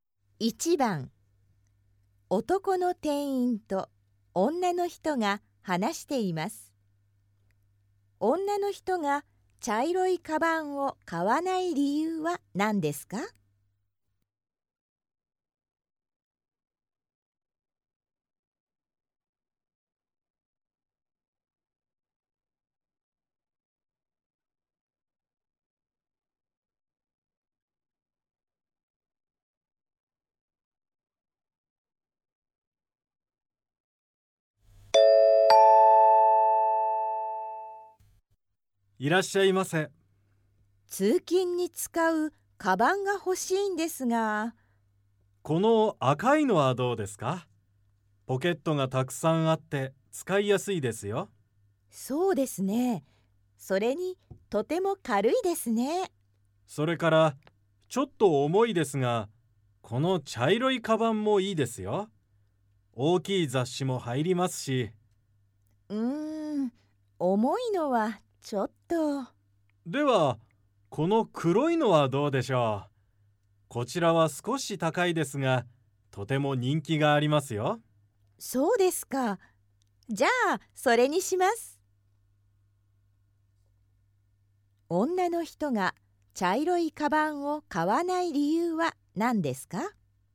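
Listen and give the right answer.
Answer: 重いから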